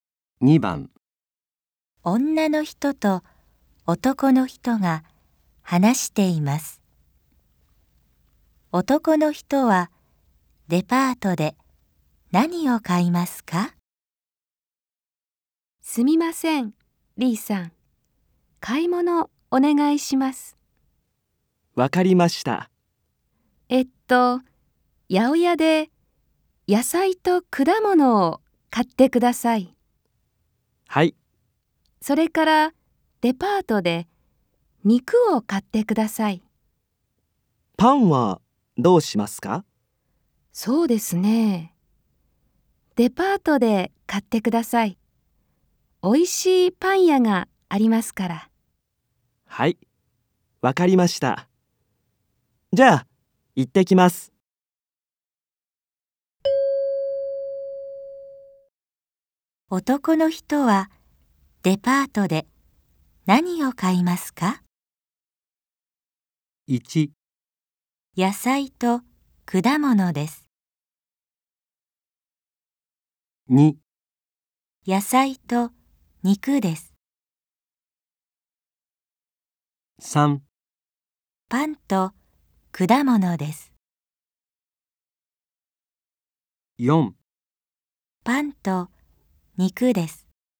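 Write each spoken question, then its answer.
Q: 男の人はデパートで何を買いますか?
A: 4: パンと肉です。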